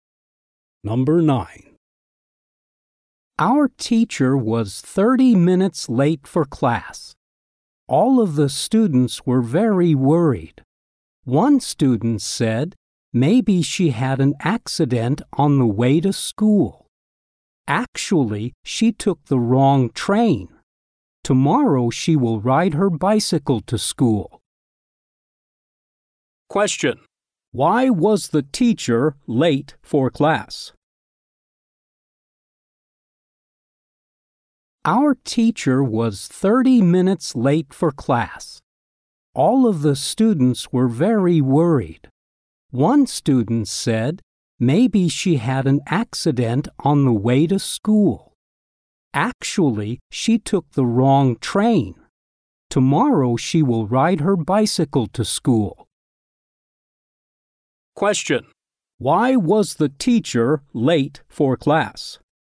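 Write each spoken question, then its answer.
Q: Why was the teacher late for class?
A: She took the wrong train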